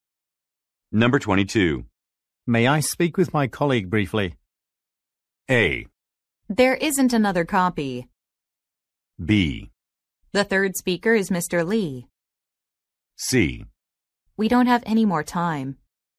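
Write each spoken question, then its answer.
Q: May I speak with my colleague briefly?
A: C: We don't have any more time.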